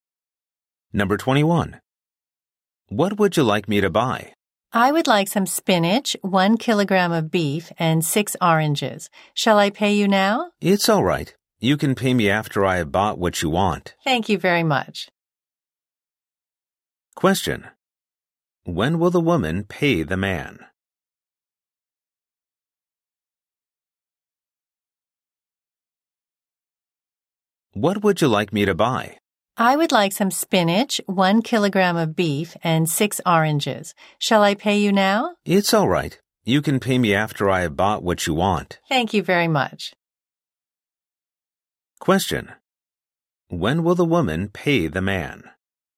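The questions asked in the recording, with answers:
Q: When will the woman pay the man?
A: After he has bought what she wants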